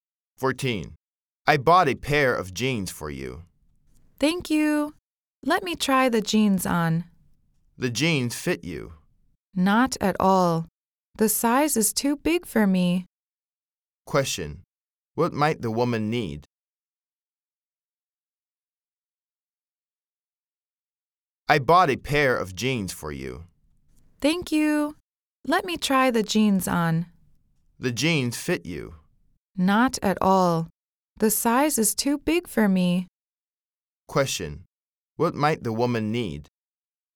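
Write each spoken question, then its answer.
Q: Question. What might the woman need?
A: A smaller pair of jeans.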